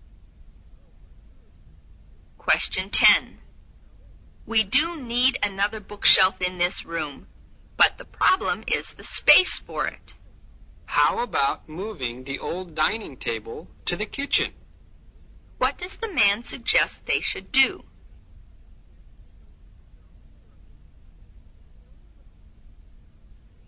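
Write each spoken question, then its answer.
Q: What does the man suggest they should do?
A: Move the old dining table to the kitchen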